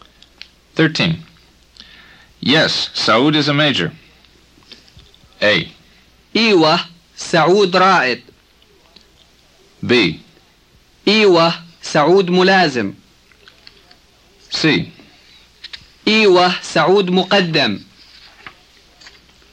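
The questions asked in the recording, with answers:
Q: Yes, Saud is a major.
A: A: إيوه, سعود رائد.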